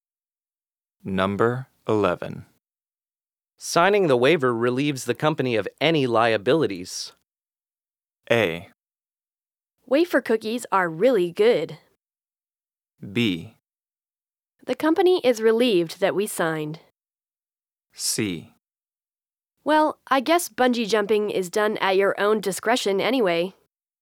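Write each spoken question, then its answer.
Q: Signing the waiver relieves the company of any liabilities.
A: C: Well, I guess bungee jumping is done at your own discretion anyway.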